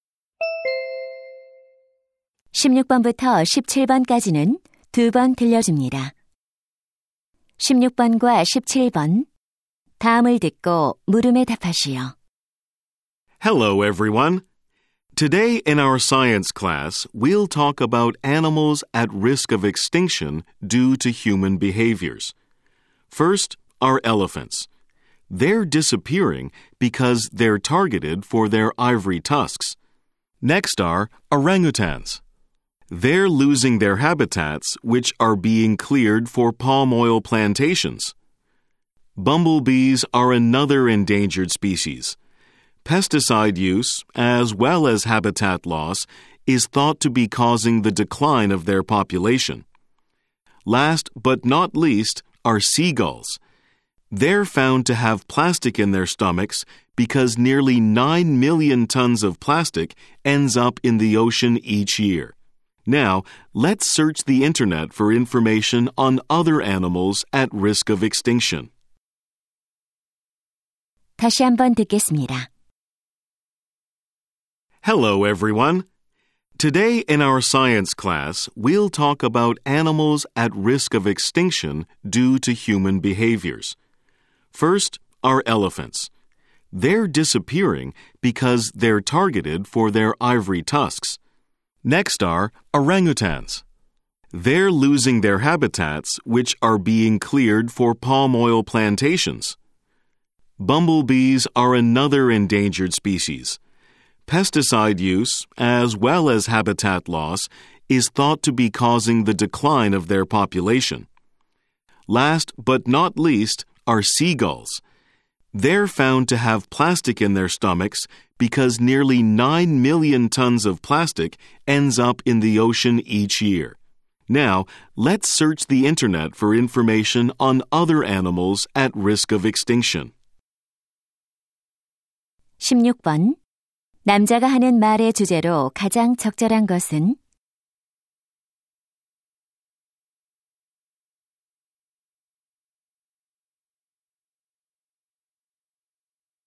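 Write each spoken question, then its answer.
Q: 남자가 하는 말의 주제로 가장 적절한 것은?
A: 인간의 행동 때문에 멸종 위기에 처한 동물들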